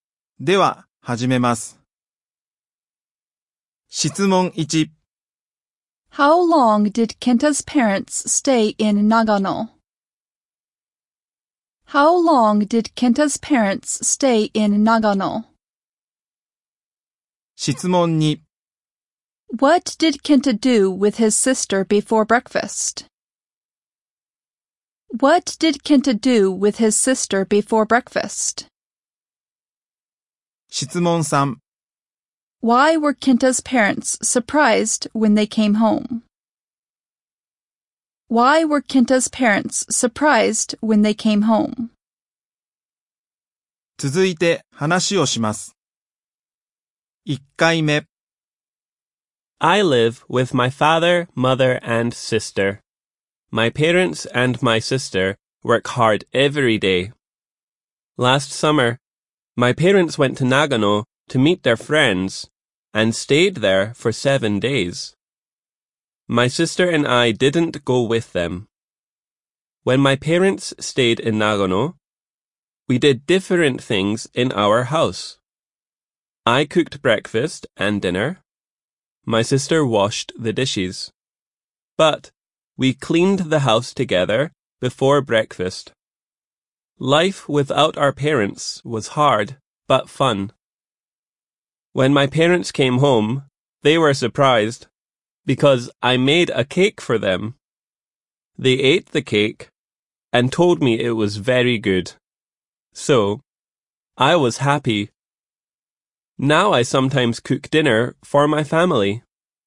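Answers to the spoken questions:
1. For 7 days
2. They cleaned the house
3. Because Kenta made a cake for them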